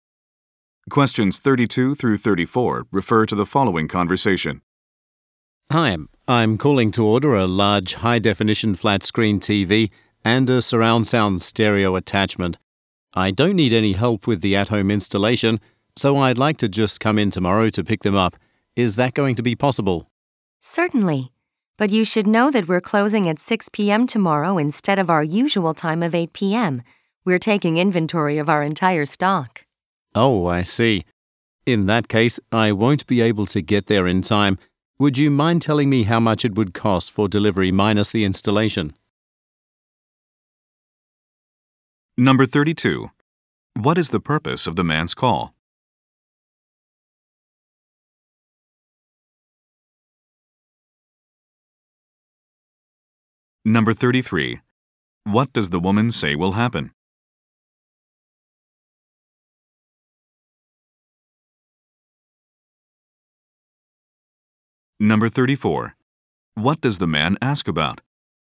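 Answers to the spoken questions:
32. To order a TV and a stereo attachment
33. The store will close early tomorrow for inventory
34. The cost of delivery without installation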